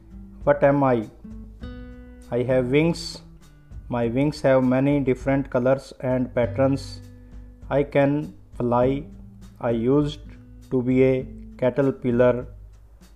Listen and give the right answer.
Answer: I am a butterfly.